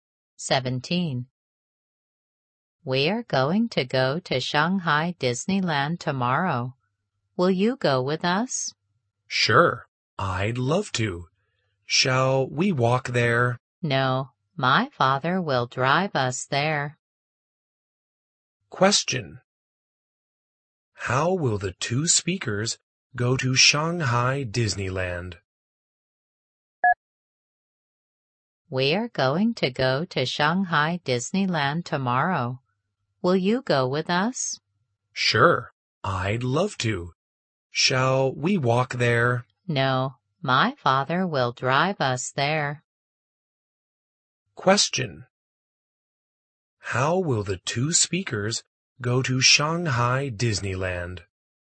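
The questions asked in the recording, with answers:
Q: How will the two speakers go to Shanghai Disneyland?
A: By car (her father will drive them).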